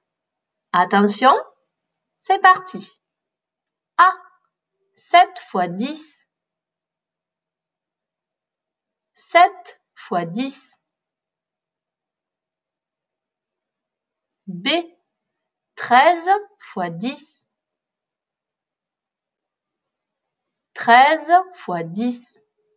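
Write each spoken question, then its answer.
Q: 7 fois 10.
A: 70

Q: 13 fois 10.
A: 130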